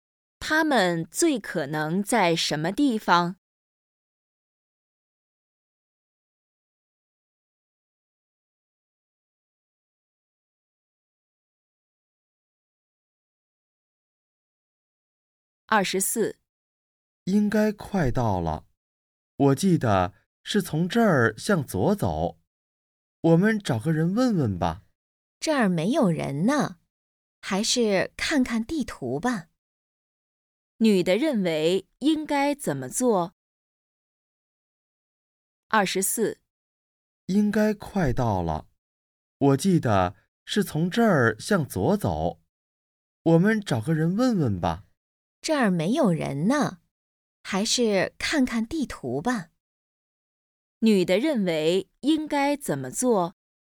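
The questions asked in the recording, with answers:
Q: 女的认为应该怎么做?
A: 看看地图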